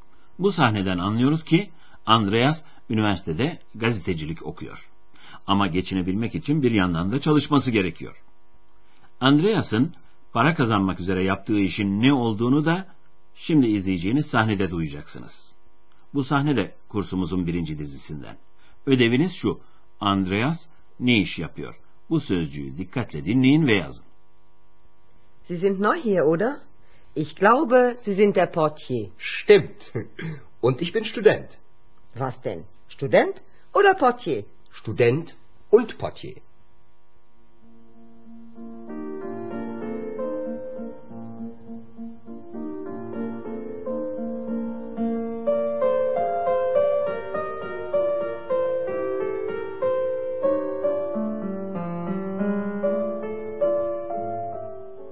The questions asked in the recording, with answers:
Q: Ödeviniz şu, Andreas ne iş yapıyor?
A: Almancası portier.